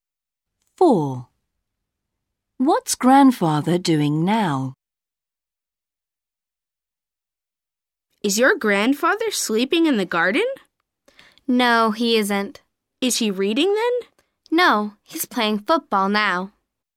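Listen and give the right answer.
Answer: playing football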